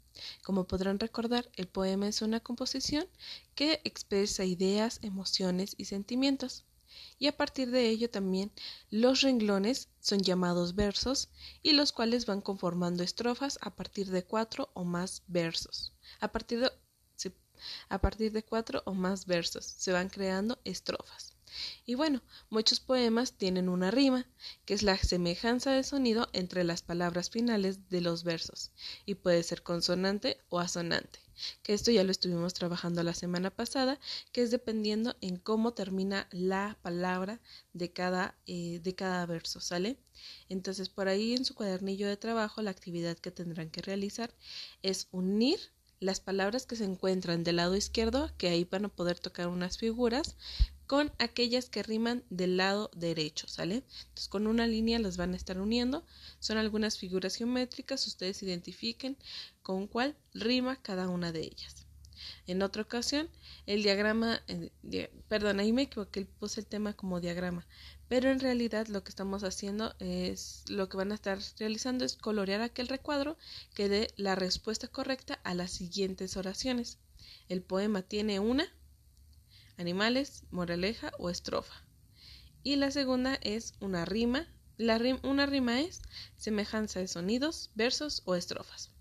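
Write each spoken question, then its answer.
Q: El poema tiene una, animales, moraleja o estrofa.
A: estrofa

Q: La una rima es semejanza de sonidos, versos o estrofas.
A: semejanza de sonidos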